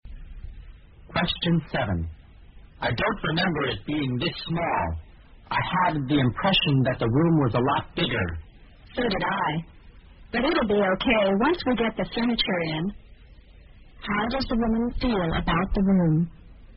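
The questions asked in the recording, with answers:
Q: How does the woman feel about the room?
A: She also thought it was bigger, but thinks it will be okay once the furniture is in.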